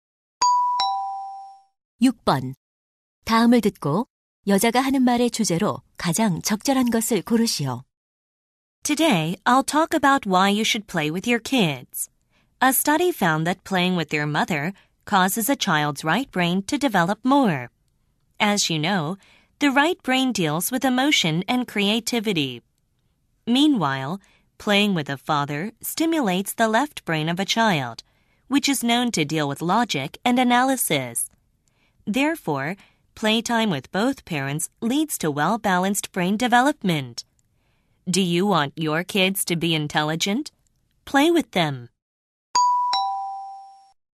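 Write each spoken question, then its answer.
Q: 다음을 듣고 여자가 하는 말의 주제로 가장 적절한 것을 고르시오.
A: 부모 모두와 노는 것이 아이의 균형 잡힌 두뇌 발달에 주는 도움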